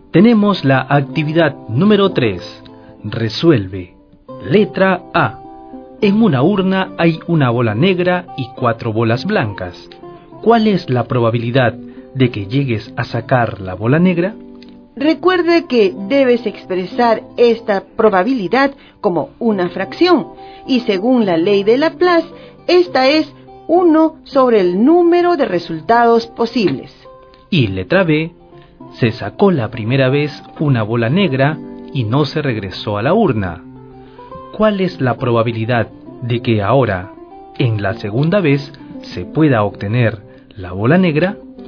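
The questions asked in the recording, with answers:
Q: ¿Cuál es la probabilidad de que llegues a sacar la bola negra?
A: 1/5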